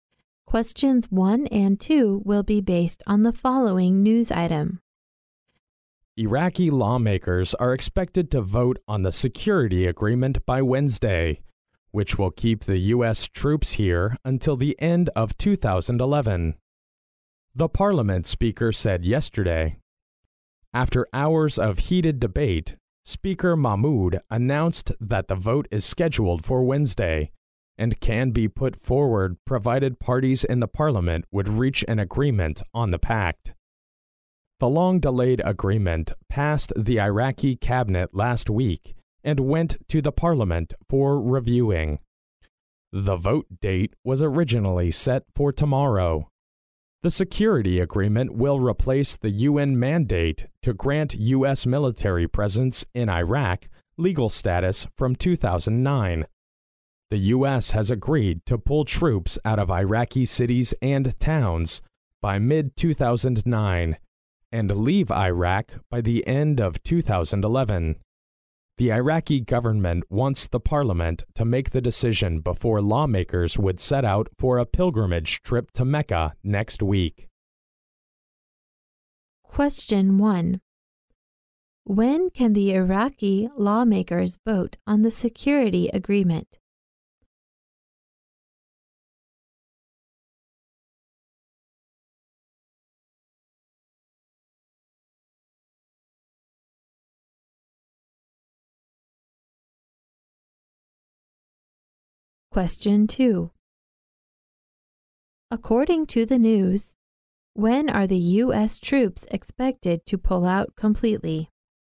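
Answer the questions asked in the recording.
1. By Wednesday
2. By the end of 2011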